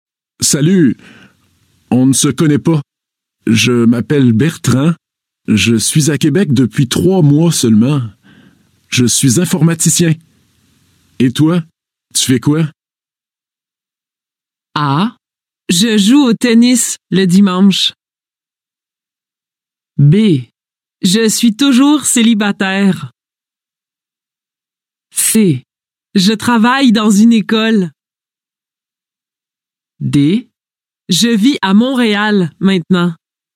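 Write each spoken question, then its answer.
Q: Et toi, tu fais quoi?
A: C: Je travaille dans une école.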